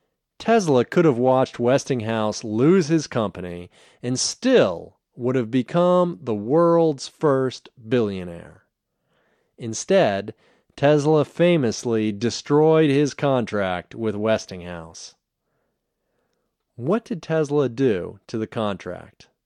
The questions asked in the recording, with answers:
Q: What did Tesla do to the contract?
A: Tesla destroyed the contract.